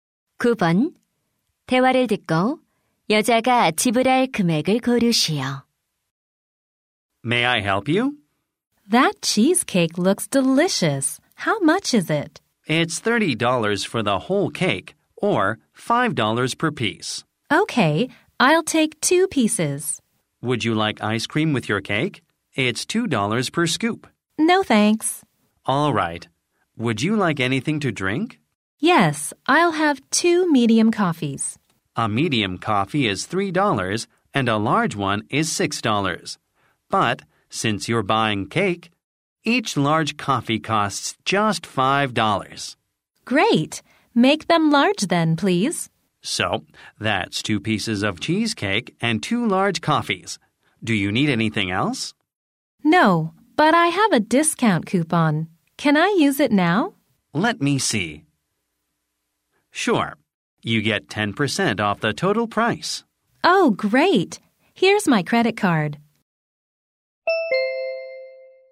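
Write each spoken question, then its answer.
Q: 대화를 듣고 여자가 지불할 금액을 고르시오.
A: 18달러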